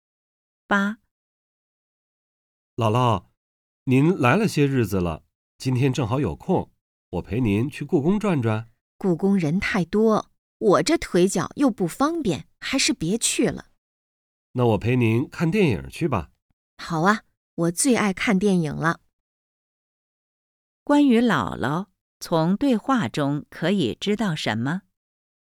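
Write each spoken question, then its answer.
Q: 关于姥姥,从对话中可以知道什么?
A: 腿脚不方便,最爱看电影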